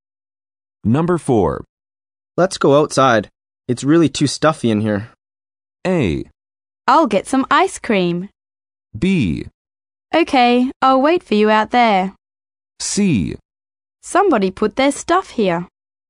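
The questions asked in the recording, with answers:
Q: Let's go outside. It's really too stuffy in here.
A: B: Okay, I'll wait for you out there.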